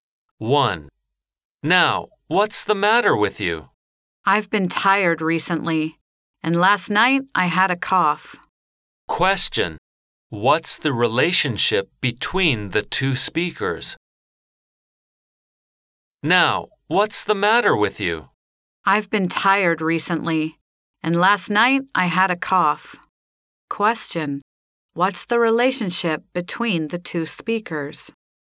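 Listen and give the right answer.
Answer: Doctor and patient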